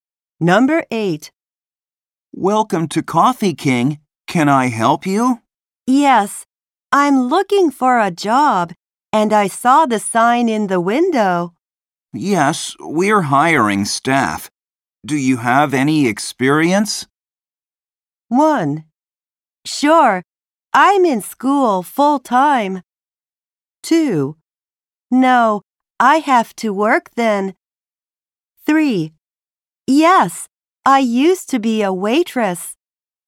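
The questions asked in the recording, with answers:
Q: Yes, we're hiring staff. Do you have any experience?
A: 3: Yes, I used to be a waitress.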